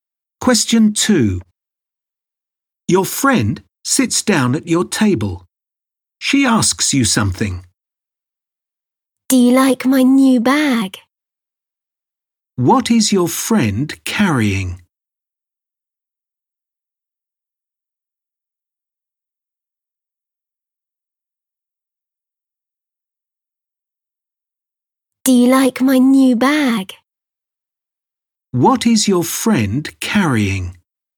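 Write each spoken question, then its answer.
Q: What is your friend carrying?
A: A new bag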